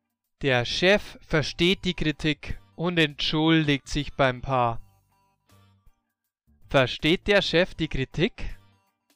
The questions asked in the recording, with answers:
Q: Versteht der Chef die Kritik?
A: Ja, er versteht die Kritik.